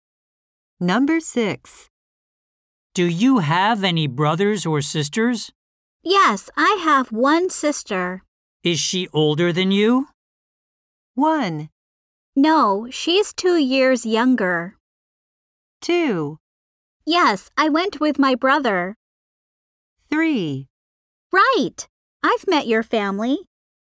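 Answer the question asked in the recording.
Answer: 1: No, she's 2 years younger.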